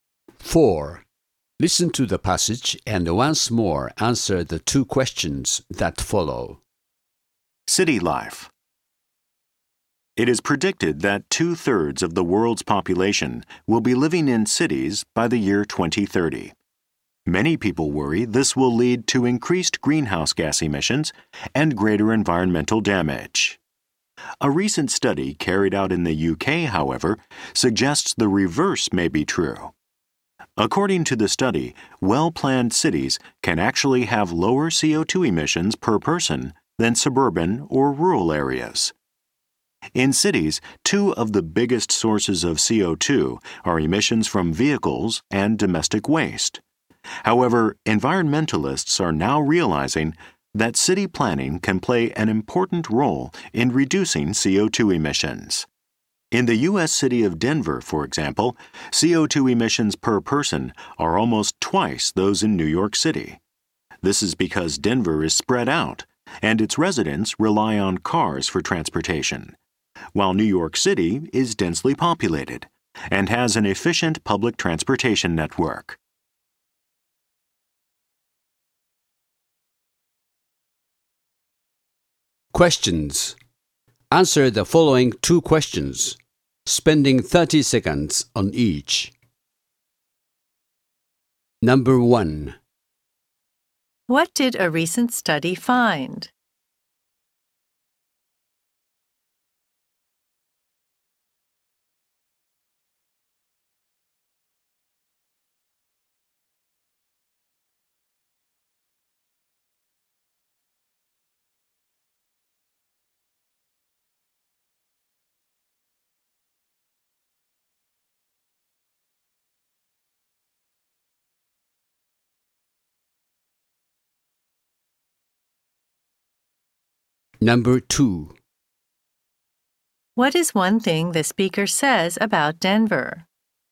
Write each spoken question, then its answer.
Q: What did a recent study find?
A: The study found that well planned cities can actually have lower CO2 emissions per person than in more rural areas.

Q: What is one thing the speaker says about Denver?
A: Even though Denver residents are less concentrated in one area, they actually produce more CO2 than New Yorkers due to their dependence on automobiles.